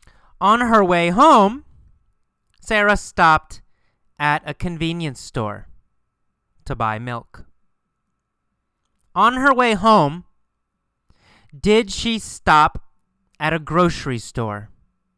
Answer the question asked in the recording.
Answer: No. Not a grocery store. On her way home, she stopped at a convenience store.